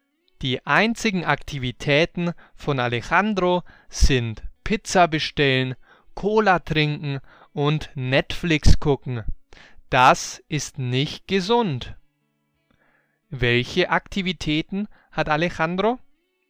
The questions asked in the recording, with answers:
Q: Welche Aktivitäten hat Alejandro?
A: Pizza bestellen, Cola trinken und Netflix gucken.